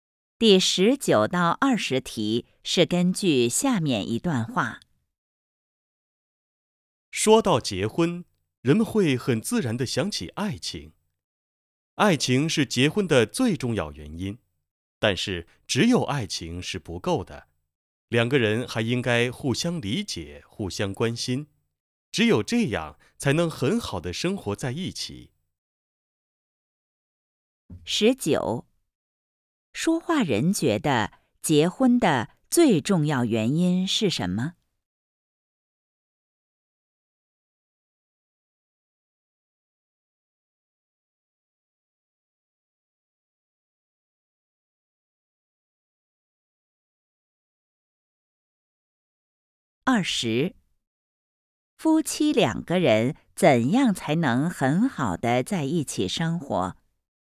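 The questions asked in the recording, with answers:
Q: 说话人觉得结婚的最重要原因是什么?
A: 爱情

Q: 夫妻两个人怎样才能很好的在一起生活?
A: 互相理解,互相关心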